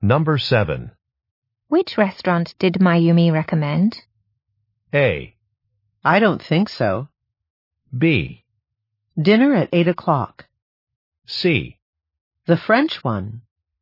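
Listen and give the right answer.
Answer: C: The French one.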